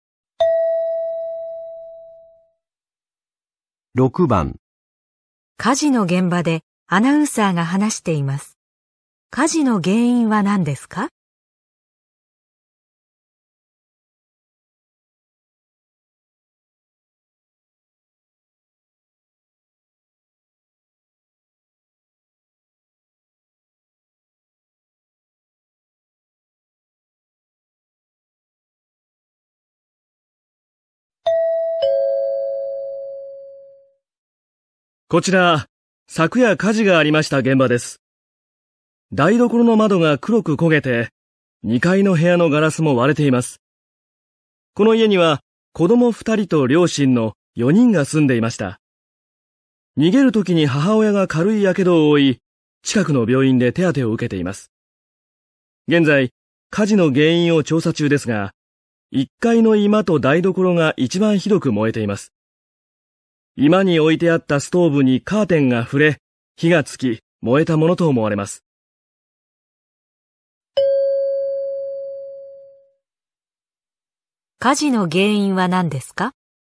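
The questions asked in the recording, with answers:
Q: 火事の原因は何ですか?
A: 居間のストーブにカーテンが触れて火がついた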